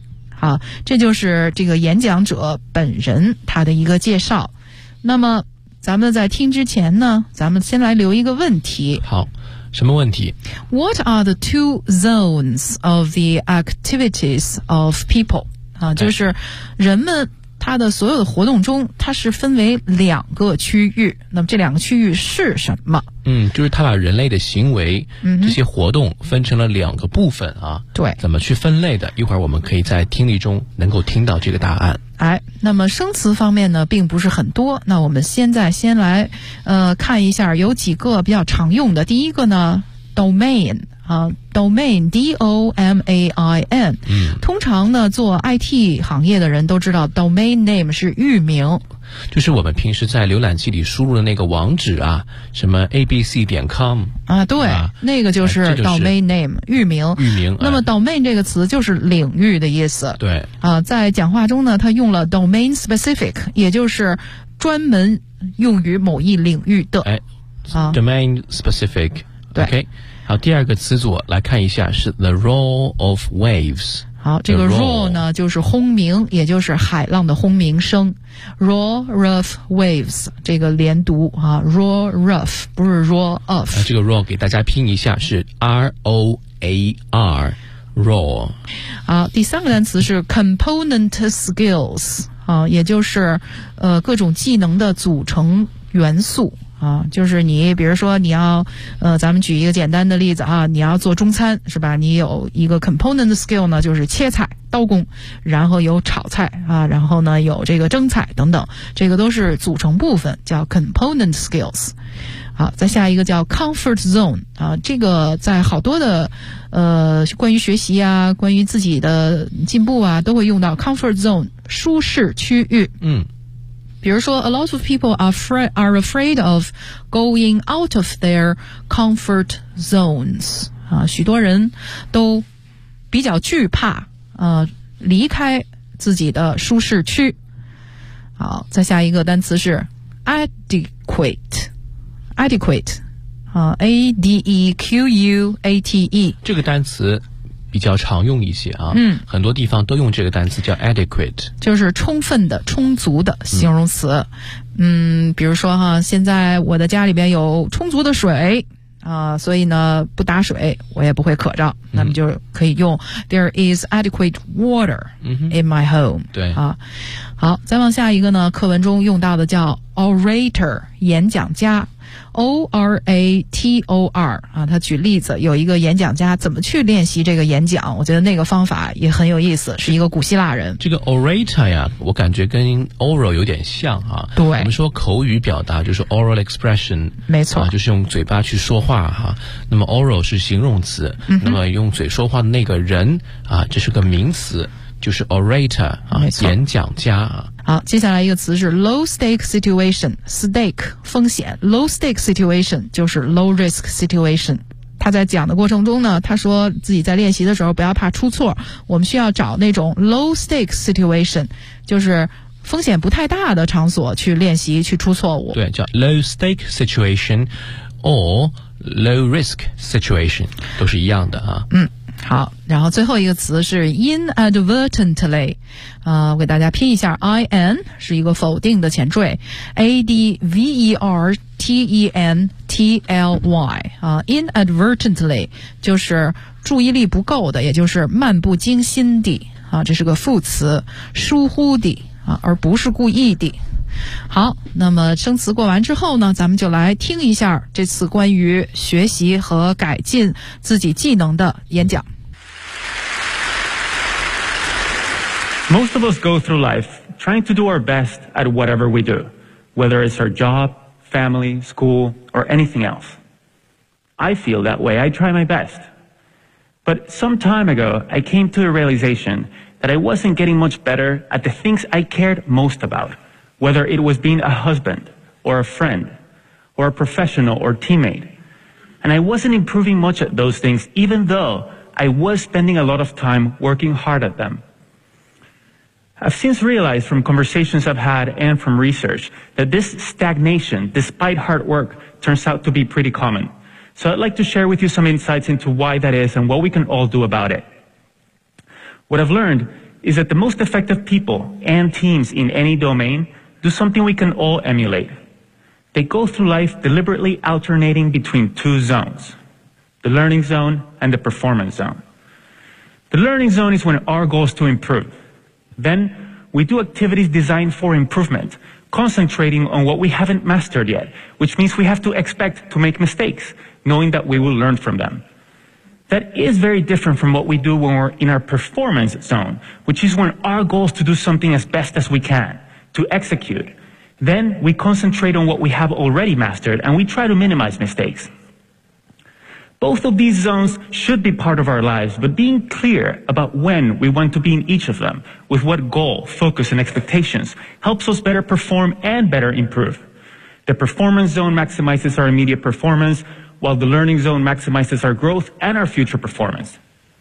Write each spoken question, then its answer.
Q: What are the two zones of the activities of people?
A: The learning zone and the performance zone.